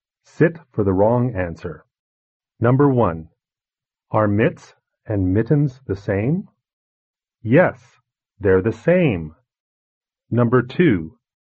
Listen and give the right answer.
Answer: Number 1. Yes. Mitts and mittens are the same.